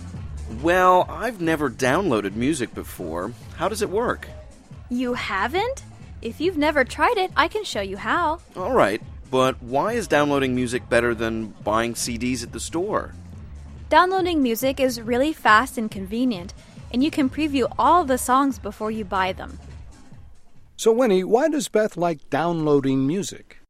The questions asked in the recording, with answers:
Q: So Winnie, why does Beth like downloading music?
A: 她说啊,从网上下载歌曲又快又方便,还可以在购买前 preview 试听一下。